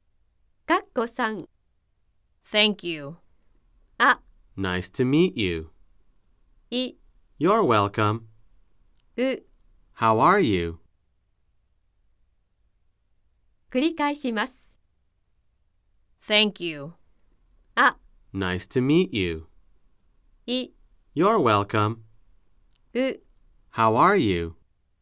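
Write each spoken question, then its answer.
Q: Thank you.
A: い: You're welcome.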